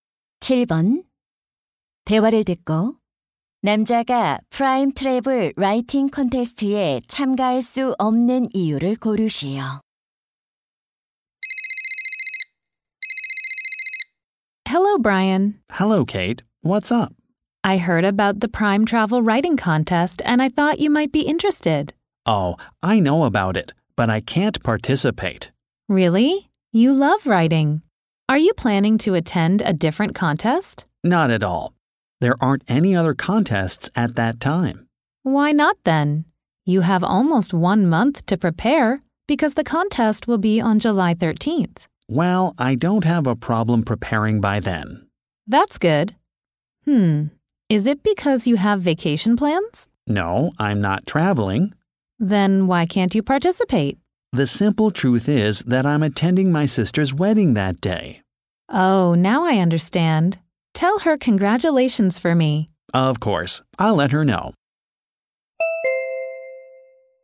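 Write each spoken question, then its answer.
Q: 대화를 듣고 남자가 프라임 트래블 라이팅 콘테스트에 참가할 수 없는 이유를 고르시오.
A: 여동생의 결혼식에 참석해야 해서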